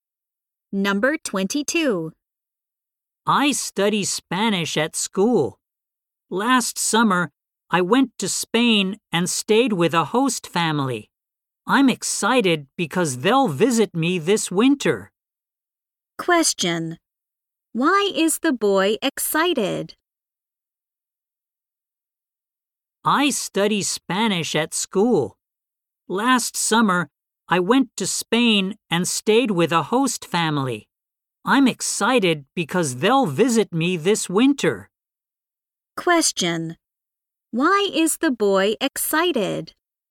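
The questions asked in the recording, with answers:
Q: Why is the boy excited?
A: His host family will visit him this winter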